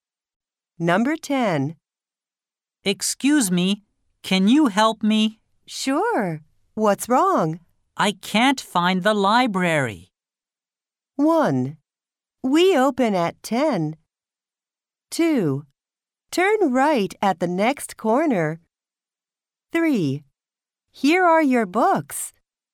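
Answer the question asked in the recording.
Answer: 2: Turn right at the next corner.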